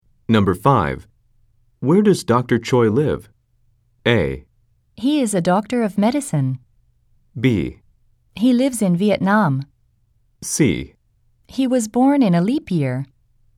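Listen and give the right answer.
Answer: B: He lives in Vietnam.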